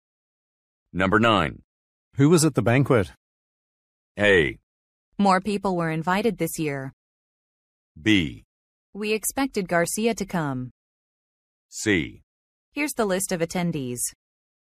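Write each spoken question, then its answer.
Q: Who was at the banquet?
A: C: Here's the list of attendees.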